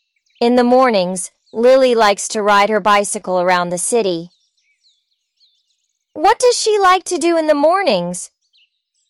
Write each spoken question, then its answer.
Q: What does she like to do in the mornings?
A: She likes to ride her bicycle around the city.